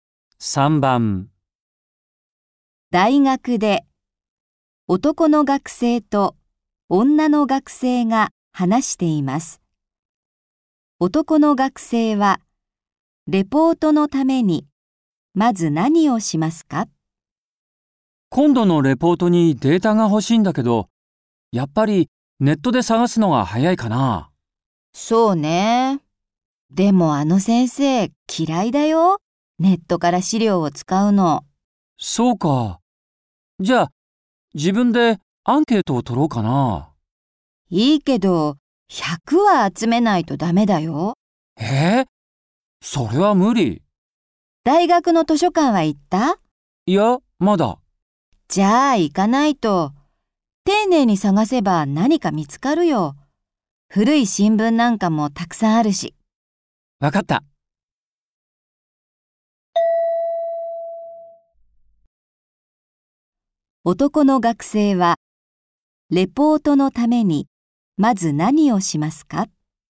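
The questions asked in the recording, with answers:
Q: 男の学生はレポートのためにまず何をしますか?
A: 大学の図書館で資料を探す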